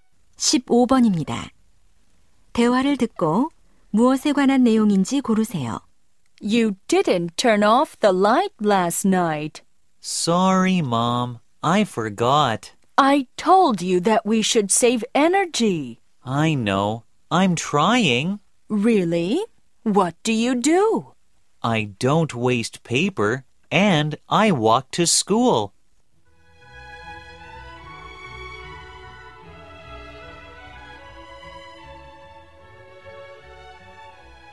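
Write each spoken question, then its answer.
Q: 대화를 듣고 무엇에 관한 내용인지 고르세요.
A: 에너지 절약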